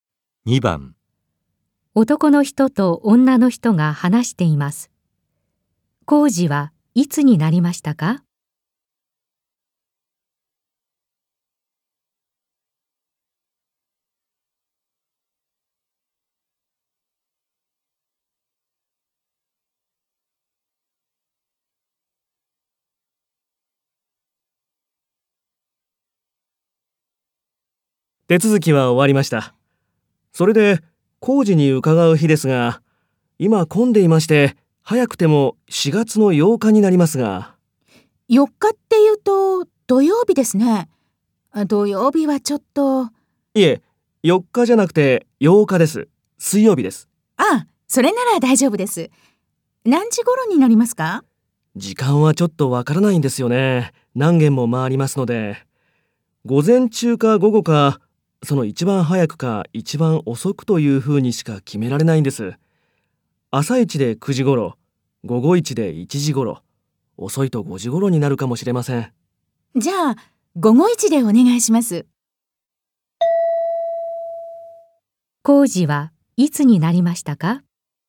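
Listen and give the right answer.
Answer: 4月8日(水曜日)の午後1時頃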